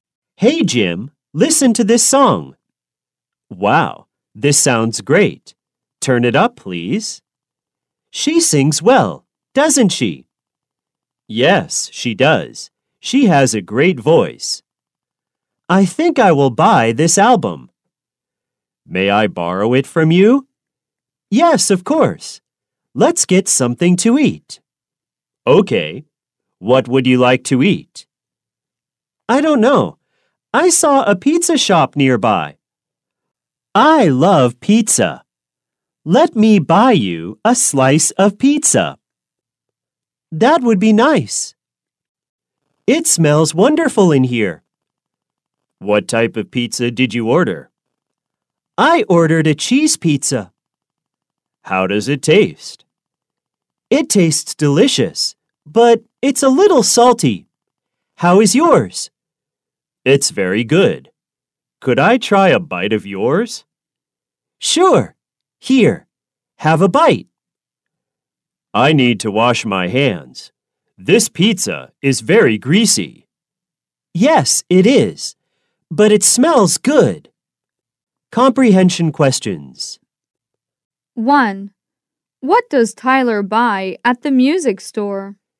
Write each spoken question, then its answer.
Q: What does Tyler buy at the music store?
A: He buys an album at the music store.